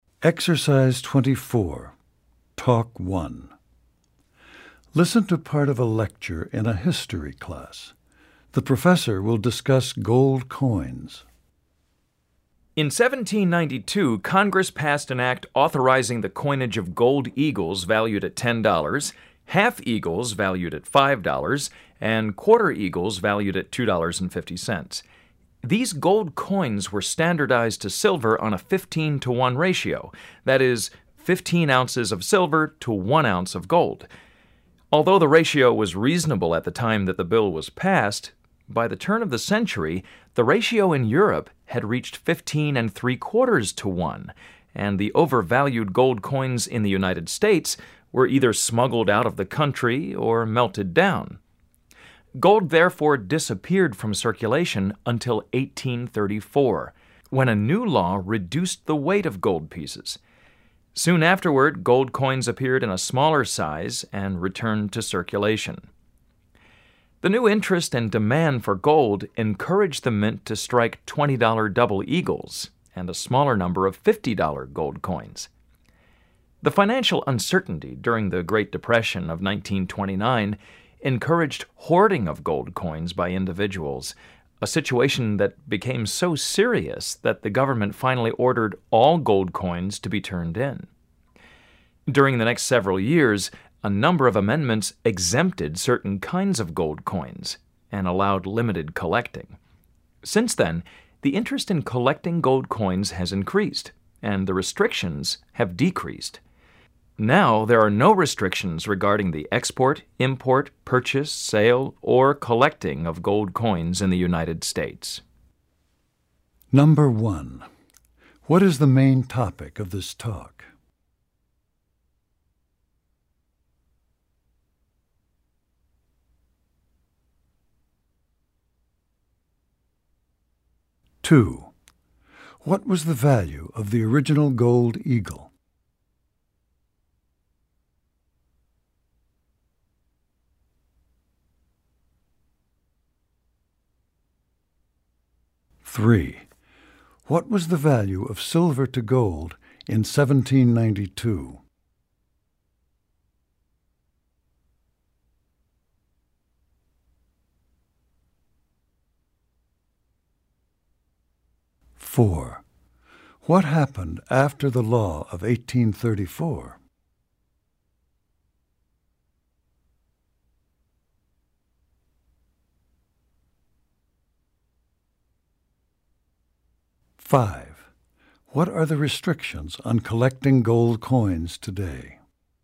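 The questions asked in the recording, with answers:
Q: What is the main topic of this talk?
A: The history of gold coins in the United States

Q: What was the value of the original gold eagle?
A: $10

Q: What was the value of silver to gold in 1792?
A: 15 to 1

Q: What happened after the law of 1834?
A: Smaller gold coins appeared and returned to circulation

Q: What are the restrictions on collecting gold coins today?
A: There are no restrictions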